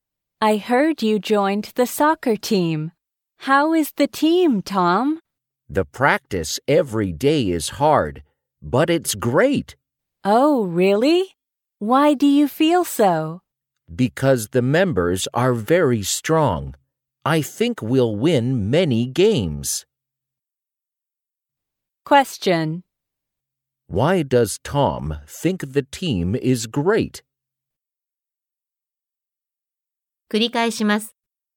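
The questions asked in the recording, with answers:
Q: Why does Tom think the team is great?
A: Because the members are very strong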